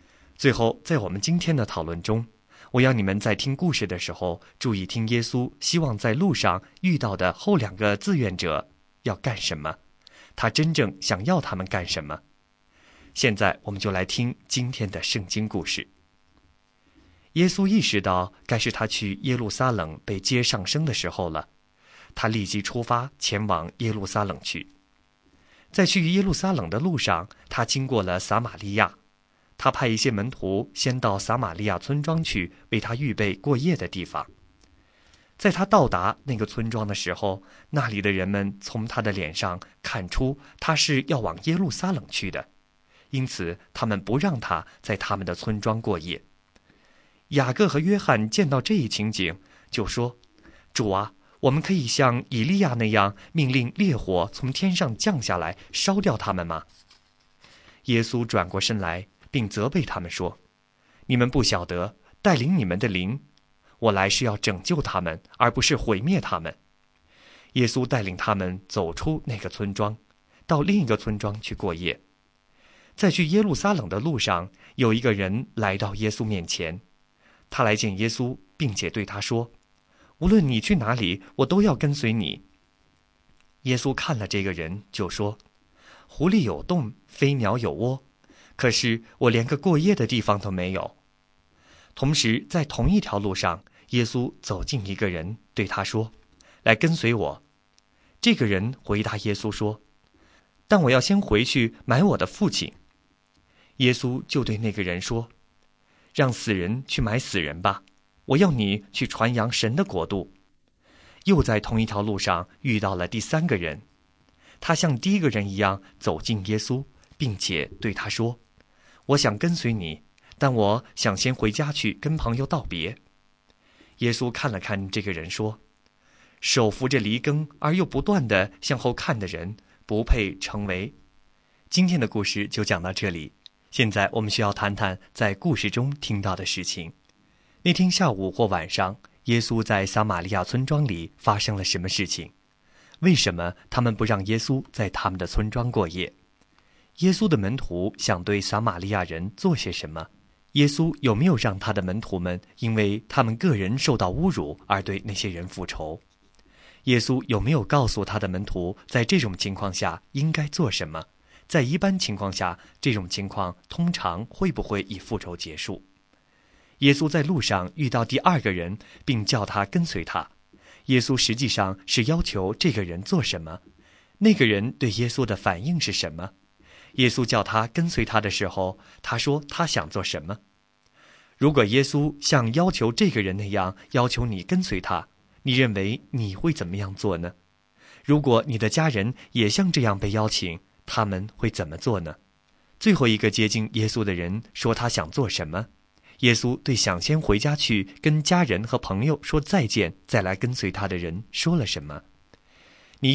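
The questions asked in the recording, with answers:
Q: 那天下午或晚上,耶稣在撒玛利亚村庄里发生了什么事情?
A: 村里的人不让他在村庄过夜

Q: 为什么他们不让耶稣在他们的村庄过夜?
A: 因为他们看出他是要往耶路撒冷去的

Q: 耶稣的门徒想对撒玛利亚人做些什么?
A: 命令烈火从天上降下来烧掉他们

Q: 耶稣有没有让他的门徒们因为他们个人受到侮辱而对那些人复仇?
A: 没有,他责备了他们

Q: 耶稣在路上遇到第二个人并叫他跟随他,耶稣实际上是要求这个人做什么?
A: 跟随他,去传扬神的国度

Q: 那个人对耶稣的反应是什么?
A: 他要先回去埋葬他的父亲

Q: 最后一个接近耶稣的人说他想做什么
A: 先回家去跟朋友道别

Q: 耶稣对想先回家去跟家人和朋友说再见再来跟随他的人说了什么?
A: 手扶着犁而又不断向后看的人不配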